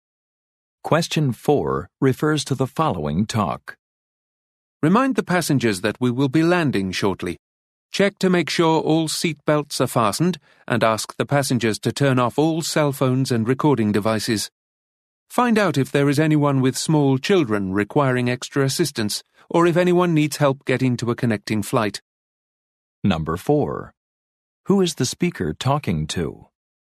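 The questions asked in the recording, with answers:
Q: Who is the speaker talking to?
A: Flight attendants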